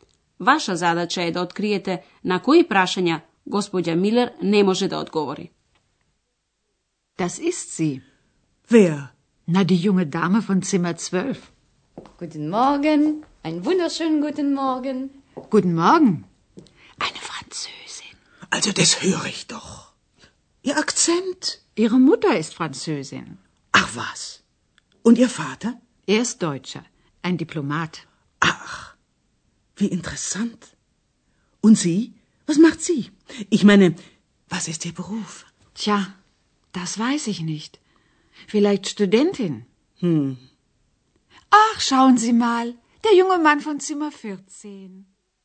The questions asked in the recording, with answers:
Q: Ваша задача е да откриете на кои прашања Gospođa Miller ne može da odgovori.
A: Прашањето на кое господја Милер не може да одговори е прашањето за професијата.